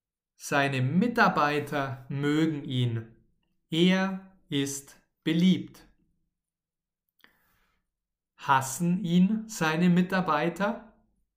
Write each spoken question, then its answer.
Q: Hassen ihn seine Mitarbeiter?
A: Nein, nein, seine Mitarbeiter hassen ihn nicht.